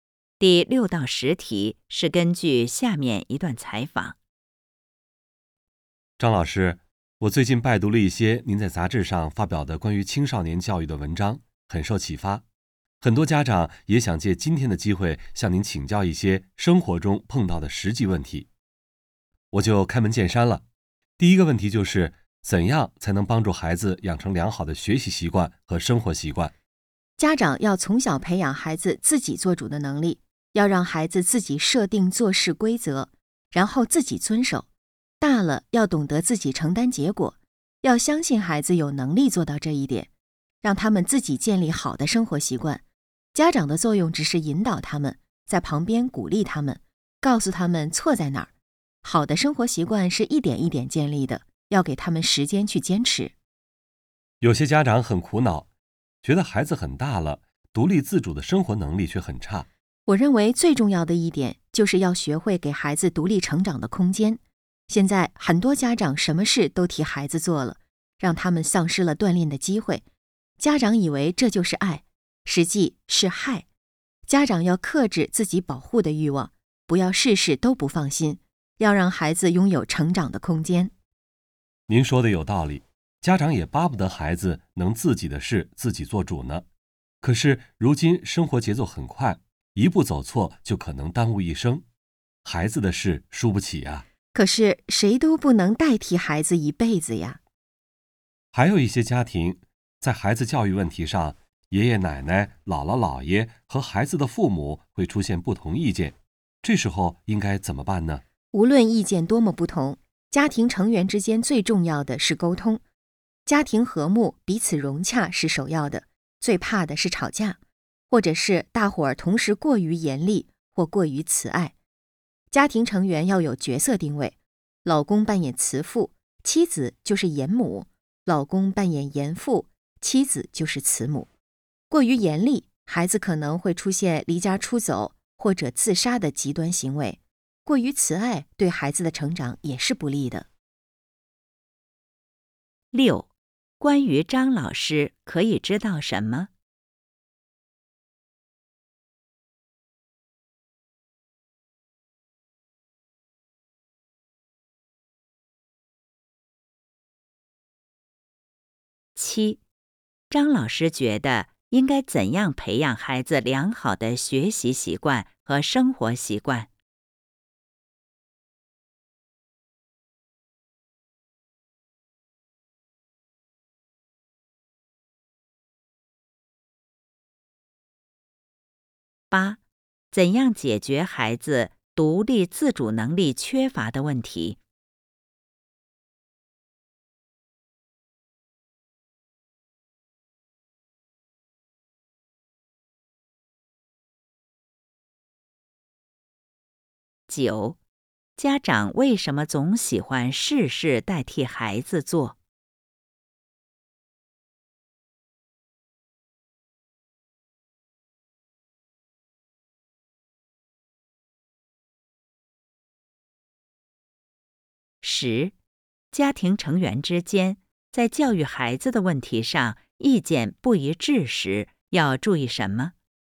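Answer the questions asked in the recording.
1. 她在杂志上发表过关于青少年教育的文章
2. 从小培养孩子自己做主的能力,让孩子自己设定规则并自己遵守
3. 给孩子独立成长的空间
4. 生活节奏很快,怕孩子一步走错耽误一生
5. 要沟通,保持家庭和睦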